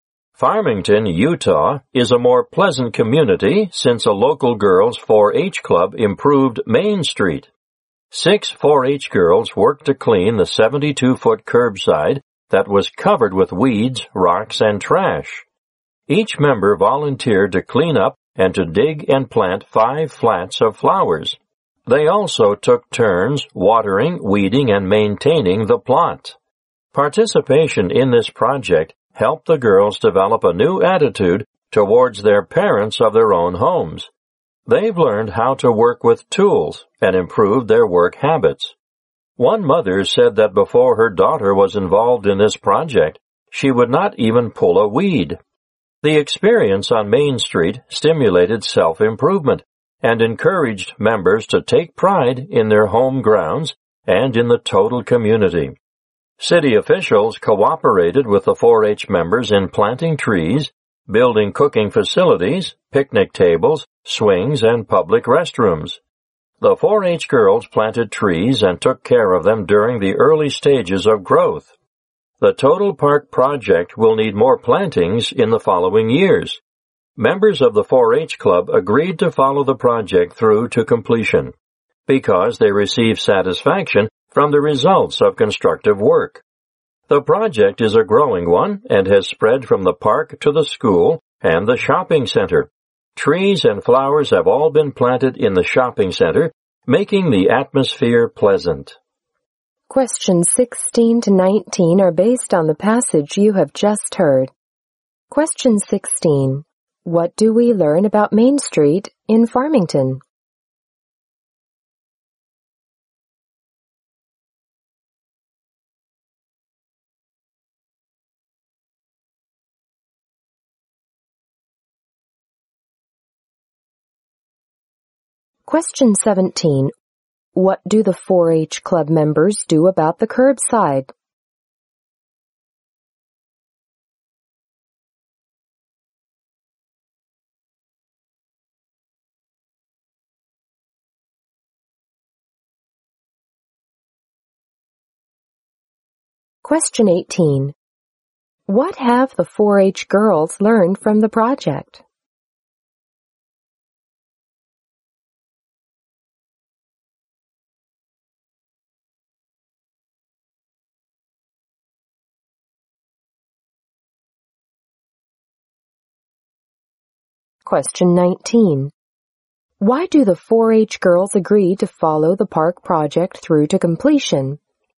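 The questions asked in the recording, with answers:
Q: What do we learn about Main Street in Farmington?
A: It was improved by a local girls' 4-H club.

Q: What do the 4-H Club members do about the curbside?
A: They cleaned it up and planted flowers.

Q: What have the 4-H girls learned from the project?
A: How to work with tools, and better work habits.

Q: Why do the 4-H girls agree to follow the park project through to completion?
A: They got satisfaction from the results of constructive work.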